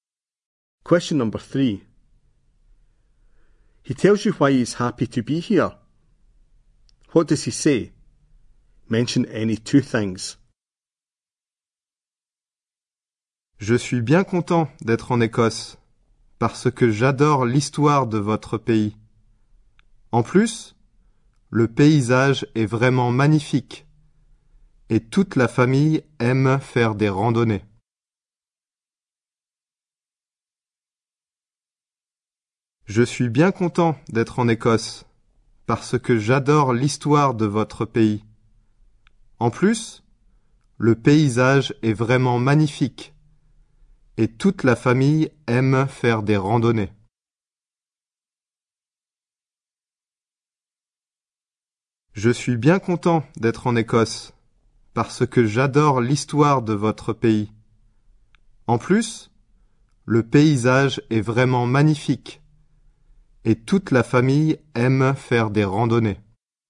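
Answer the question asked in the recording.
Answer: He loves Scotland's history; the scenery is magnificent; the family likes hillwalking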